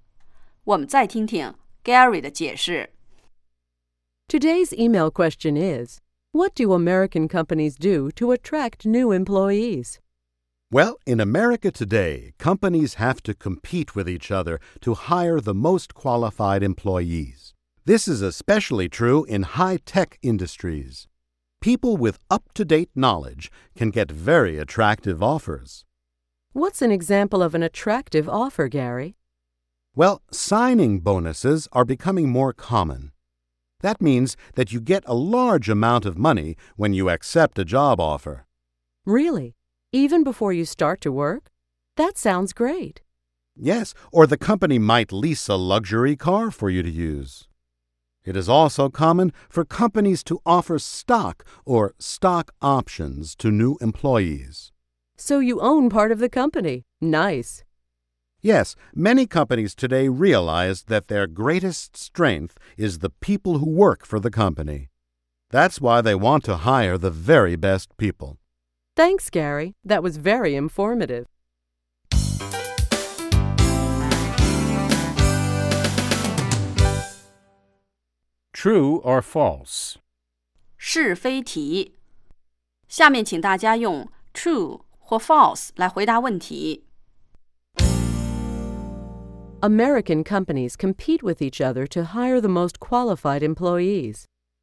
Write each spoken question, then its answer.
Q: American companies compete with each other to hire the most qualified employees.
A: True. This is especially true in high-tech industries.